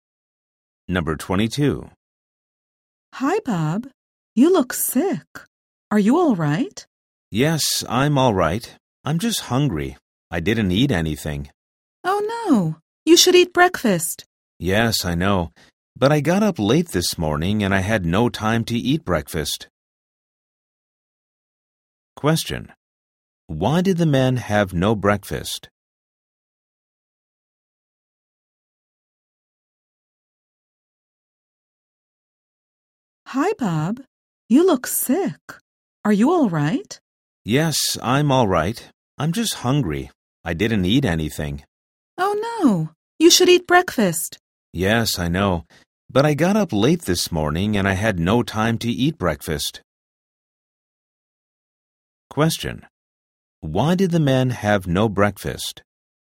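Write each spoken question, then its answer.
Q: Why did the men have no breakfast?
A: He got up late and had no time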